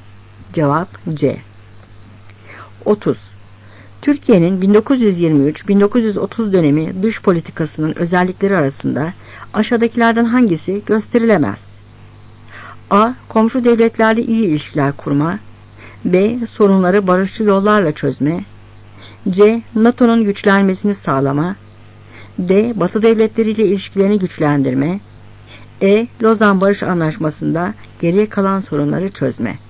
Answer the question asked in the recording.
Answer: Cevap C.